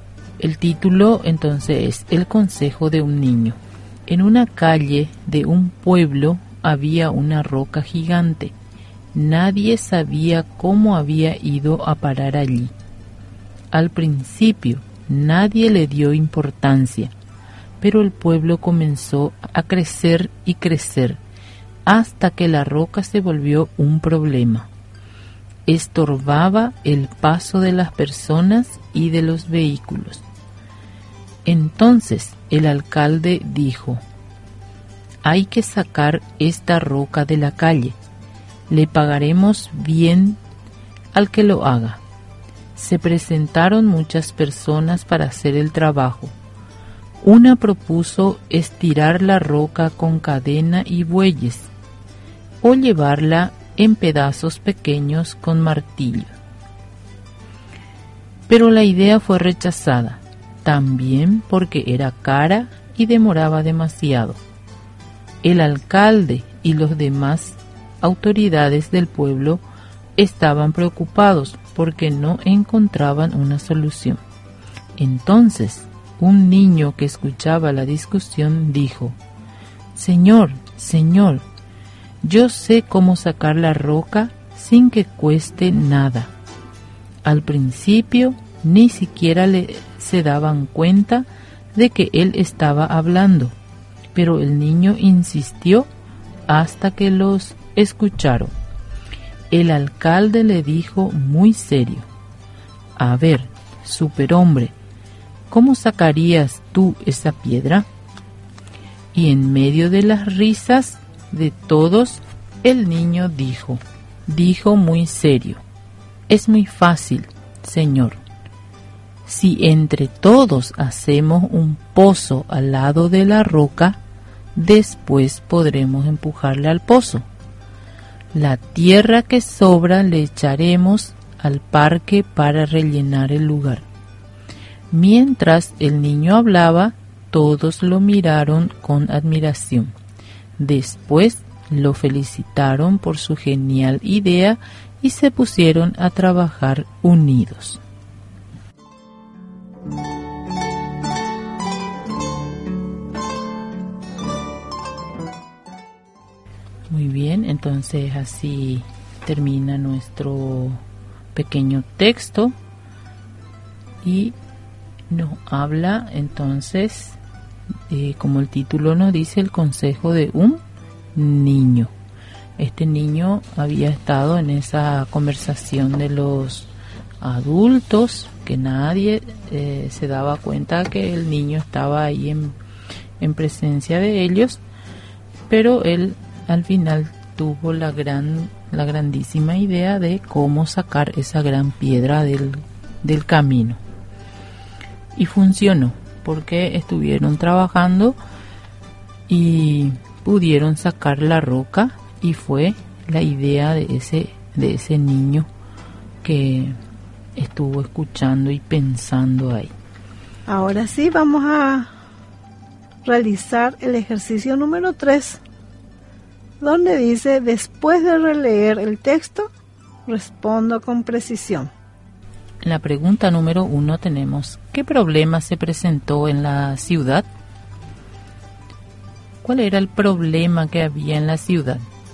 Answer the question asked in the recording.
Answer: en la ciudad había caído una gran piedra en el camino, y eso era provocaba un problema a medida que la ciudad iba creciendo.